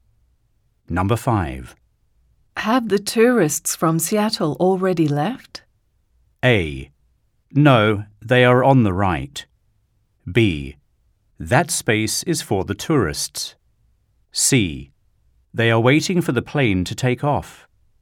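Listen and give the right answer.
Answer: C: They are waiting for the plane to take off.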